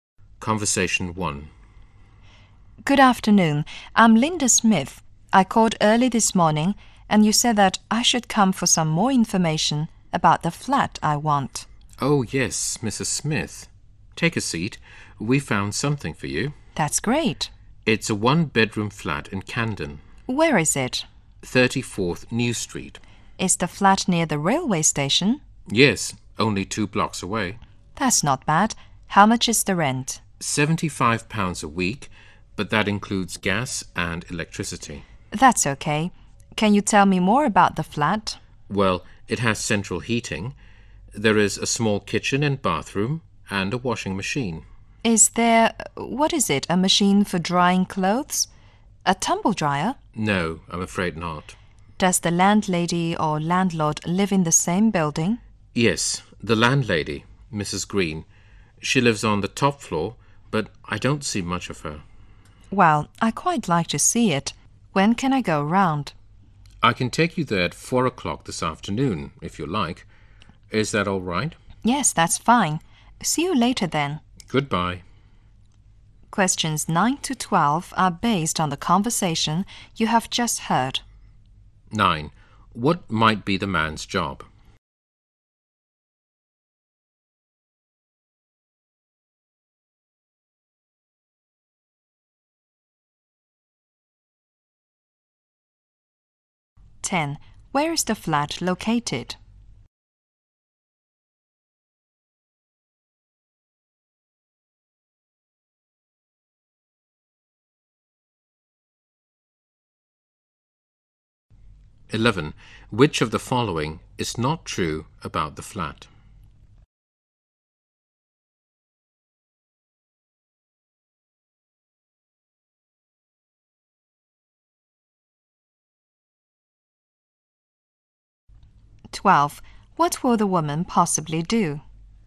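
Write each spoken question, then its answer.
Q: What might be the man's job?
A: Estate agent (housing agent)

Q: Where is the flat located?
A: 34th New Street, Camden, two blocks from the railway station

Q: What will the woman possibly do?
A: Go to see the flat at 4 o'clock this afternoon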